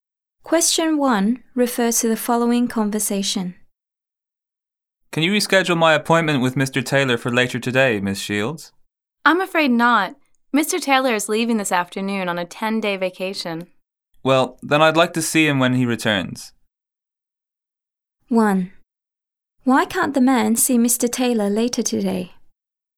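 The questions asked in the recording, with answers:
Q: Why can't the man see Mr. Taylor later today?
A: Mr. Taylor is leaving this afternoon on a 10-day vacation.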